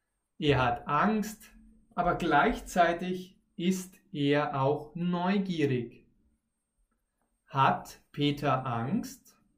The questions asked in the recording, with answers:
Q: Hat Peter Angst?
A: Ja, Peter hat Angst.